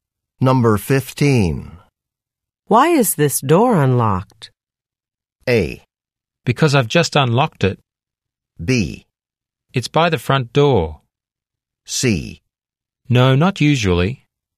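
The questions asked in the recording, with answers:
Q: Why is this door unlocked?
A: A: Because I've just unlocked it.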